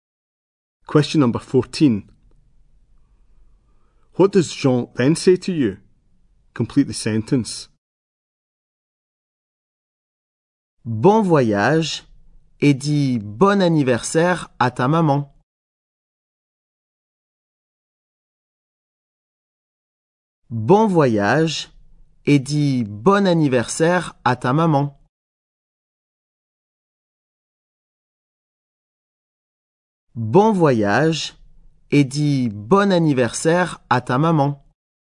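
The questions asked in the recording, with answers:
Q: What does Jean then say to you?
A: Have a good trip and say happy birthday to your mum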